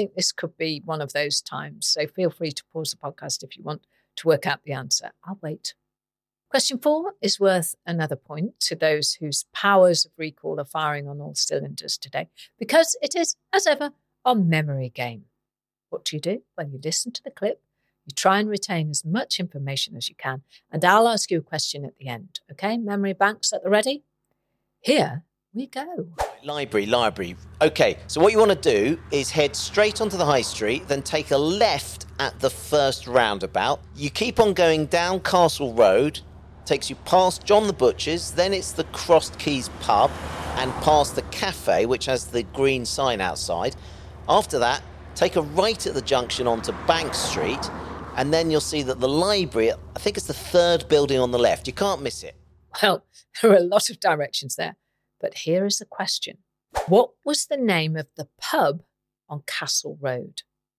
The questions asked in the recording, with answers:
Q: What was the name of the pub on Castle Road?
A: And the answer we're looking for is the Crossed Keys.